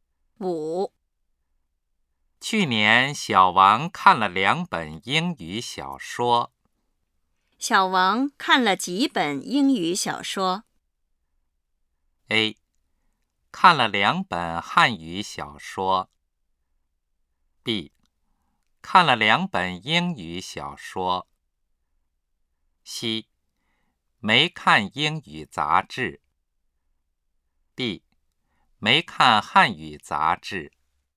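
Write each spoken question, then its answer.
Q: 小王看了几本英语小说?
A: B: 看了2本英语小说。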